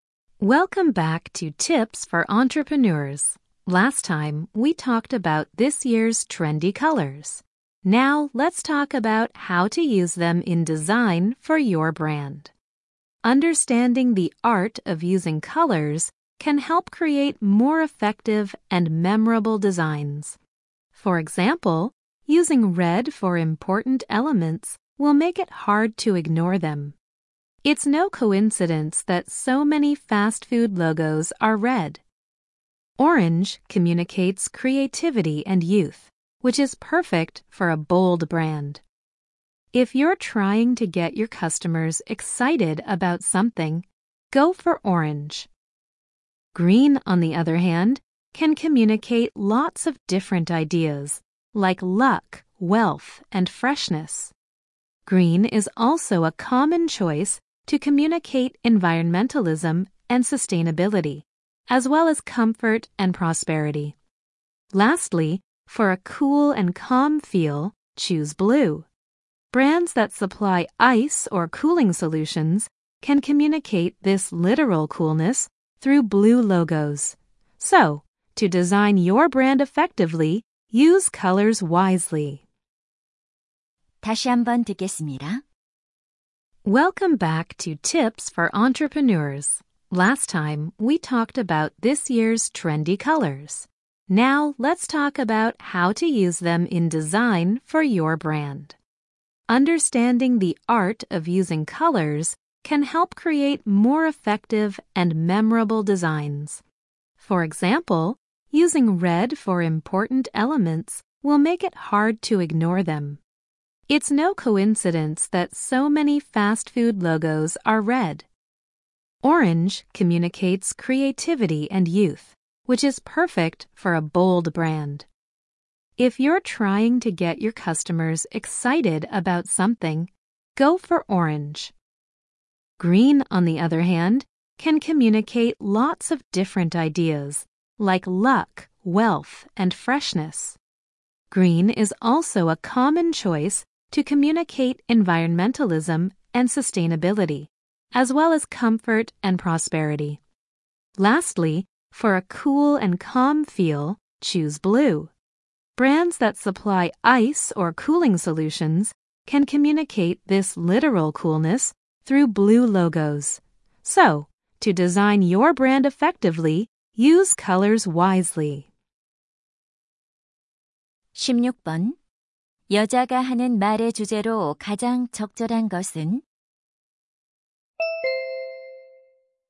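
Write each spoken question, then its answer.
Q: 여자가 하는 말의 주제로 가장 적절한 것은?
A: 브랜드 디자인에서 색깔을 효과적으로 사용하는 방법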